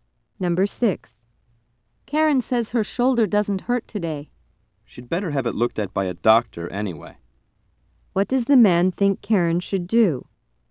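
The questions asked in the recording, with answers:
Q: What does the man think Karen should do?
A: Have a doctor look at her shoulder.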